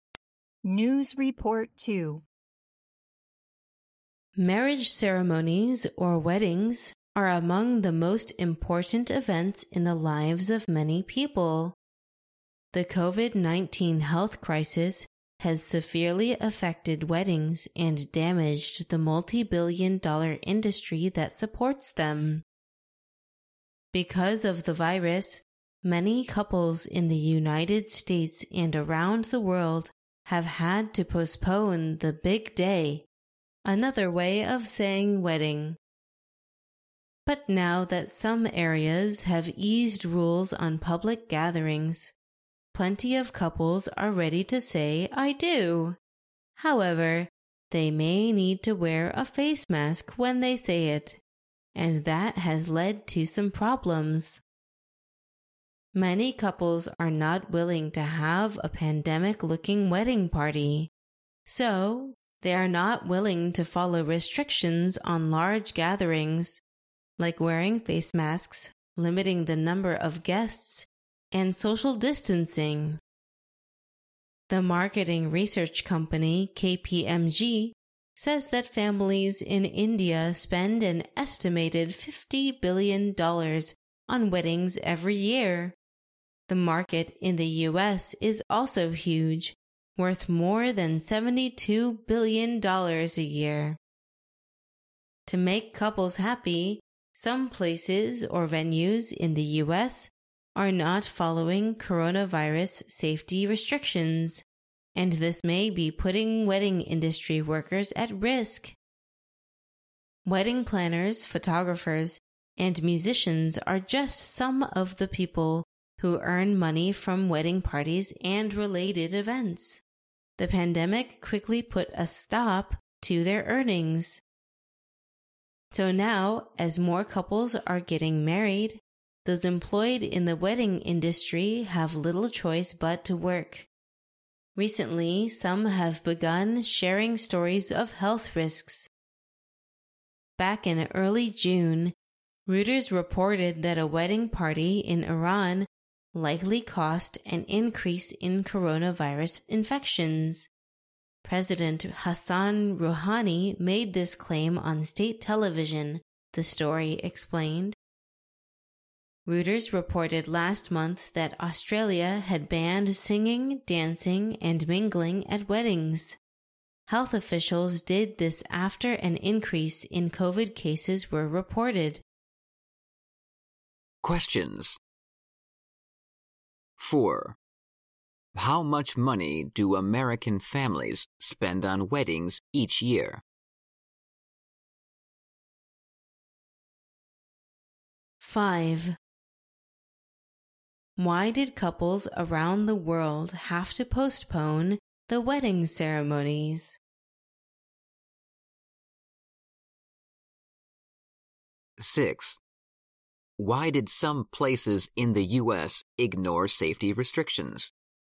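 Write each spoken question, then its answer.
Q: How much money do American families spend on weddings each year?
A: More than $72 billion

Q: Why did couples around the world have to postpone the wedding ceremonies?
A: Because of the COVID-19 virus

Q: Why did some places in the U.S. ignore safety restrictions?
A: To make couples happy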